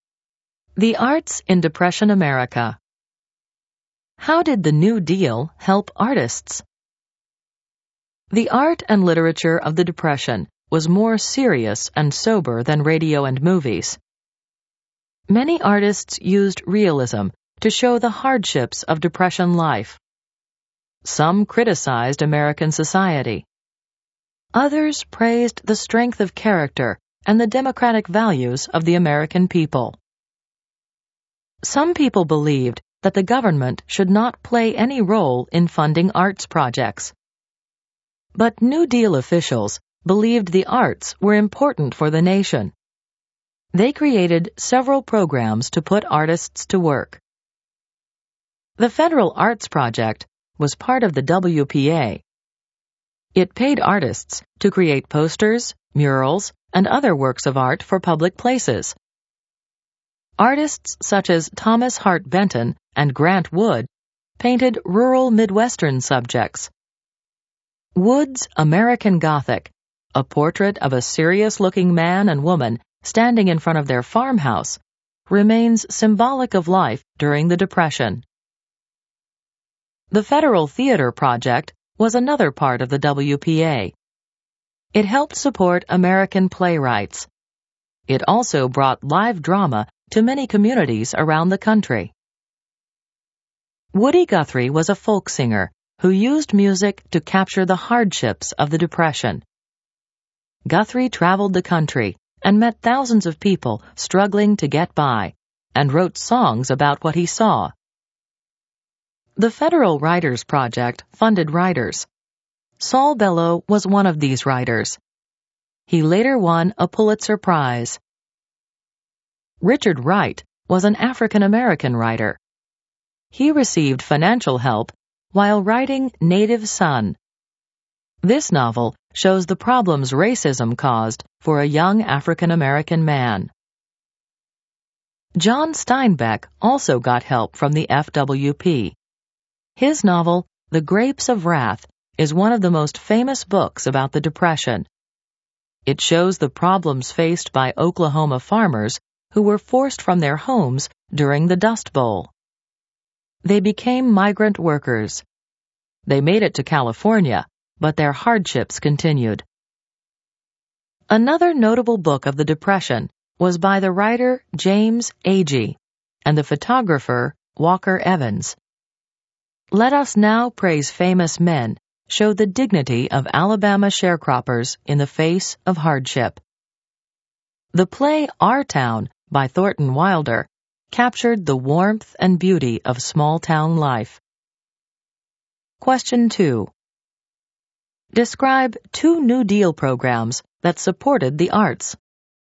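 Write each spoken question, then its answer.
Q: Describe two New Deal programs that supported the arts.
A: The Federal Arts Project paid artists to make posters and murals for public places; the Federal Theater Project supported playwrights and brought live drama to communities (also the Federal Writers Project funded writers).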